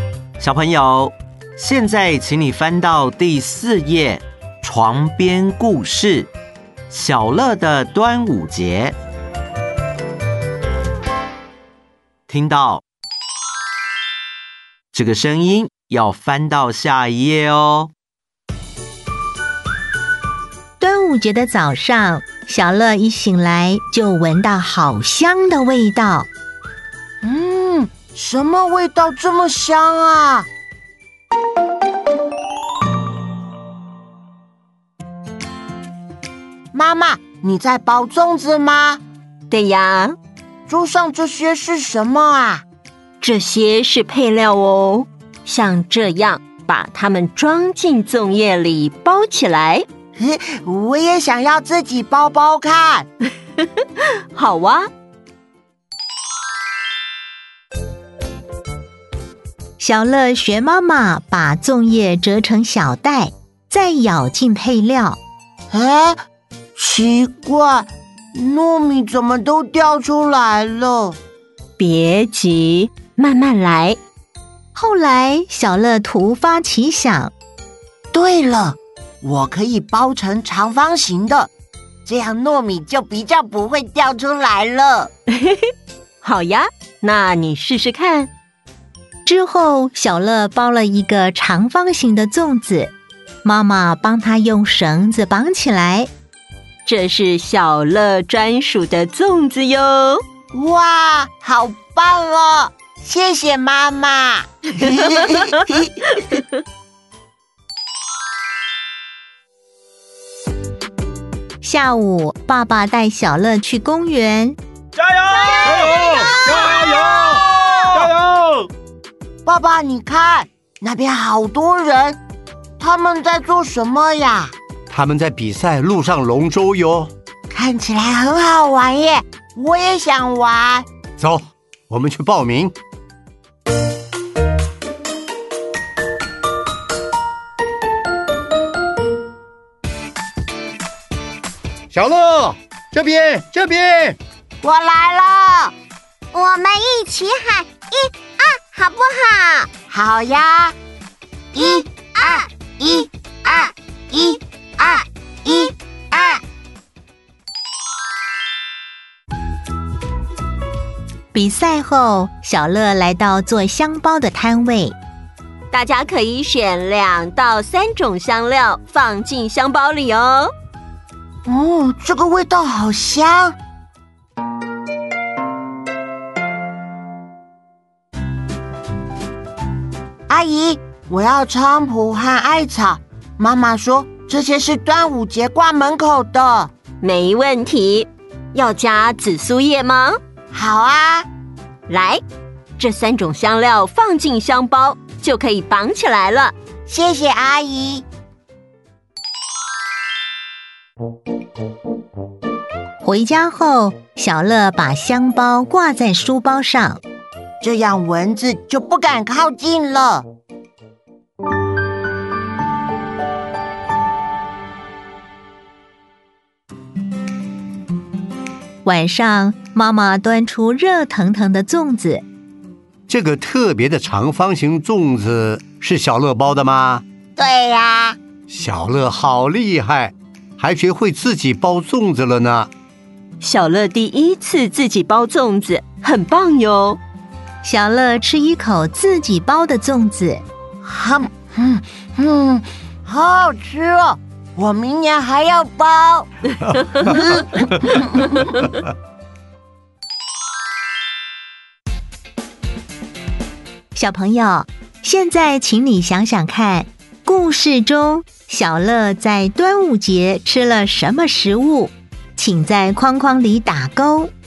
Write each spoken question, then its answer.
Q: 故事中小乐在端午节吃了什么食物,请在框框里打勾。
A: 粽子。